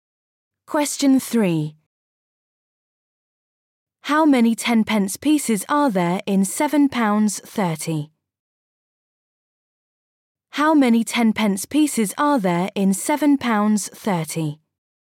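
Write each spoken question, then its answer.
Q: How many 10-pence pieces are there in £7.30?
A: 73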